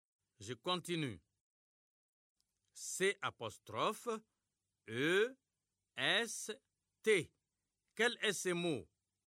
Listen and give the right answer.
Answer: J'espère que vous avez trouvé c'est.